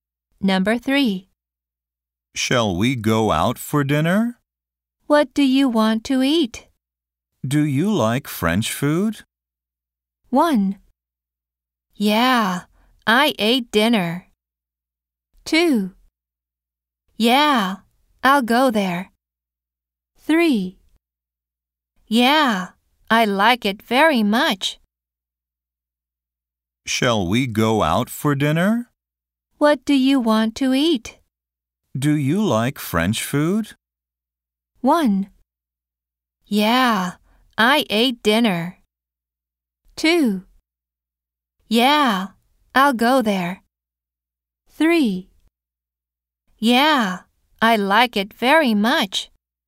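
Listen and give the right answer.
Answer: 3: Yeah, I like it very much.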